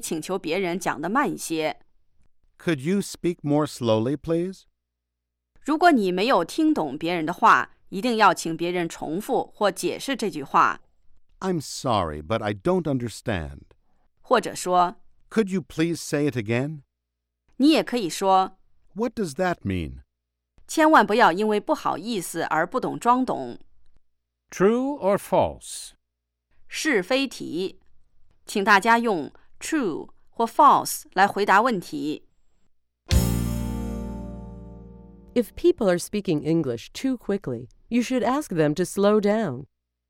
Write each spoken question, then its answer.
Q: If people are speaking English too quickly, you should ask them to slow down.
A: True, you can say, "Could you speak more slowly, please?"